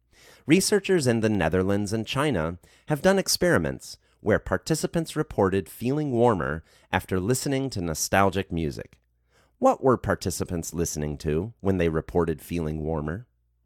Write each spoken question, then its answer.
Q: What were participants listening to when they reported feeling warmer?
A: Participants were listening to nostalgic music when they reported feeling warmer.